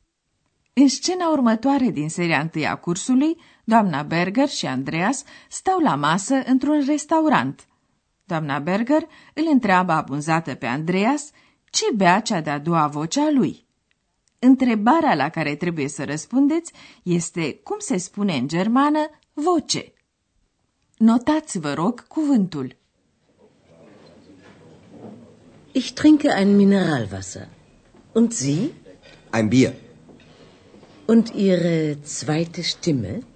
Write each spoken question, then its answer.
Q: Întrebarea la care trebuie să răspundeți este cum se spune în germană voce.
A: Este Stimme.